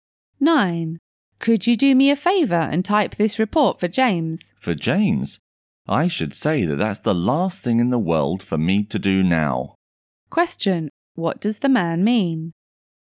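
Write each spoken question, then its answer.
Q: What does the man mean?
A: He is unwilling to type the report for James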